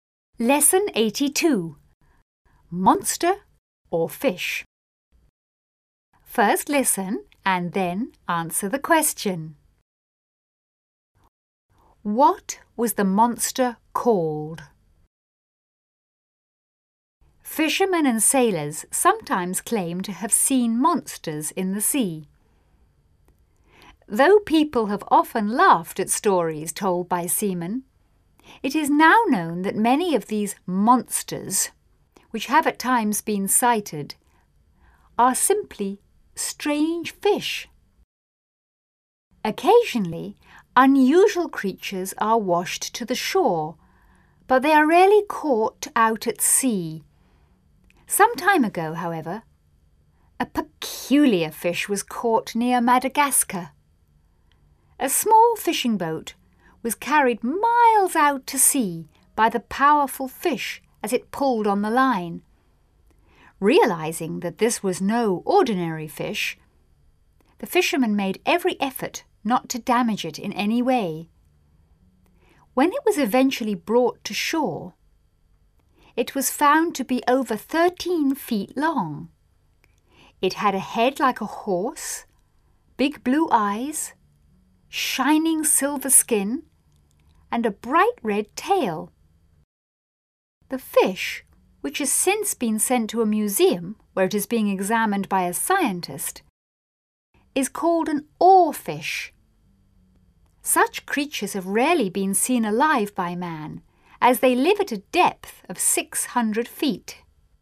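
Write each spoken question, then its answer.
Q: What was the monster called?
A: An oarfish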